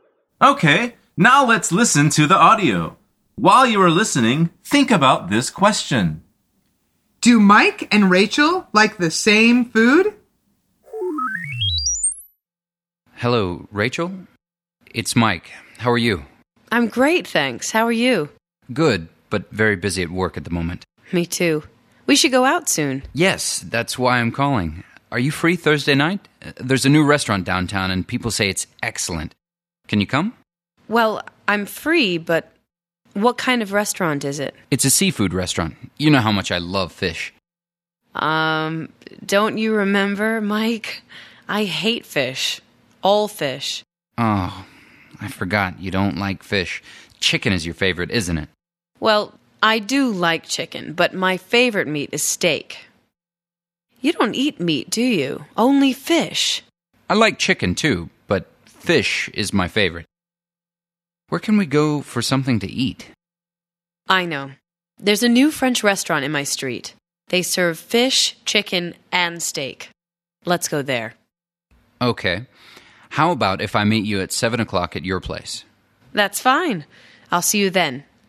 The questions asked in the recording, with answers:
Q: Do Mike and Rachel like the same food?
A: The answer is no.